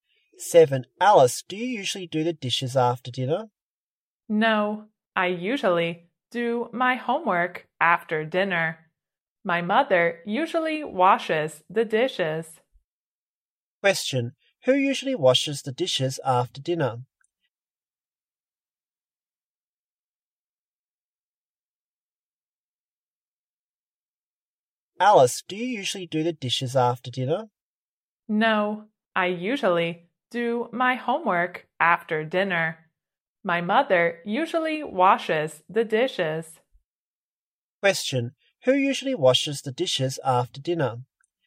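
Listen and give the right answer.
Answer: Alice's mother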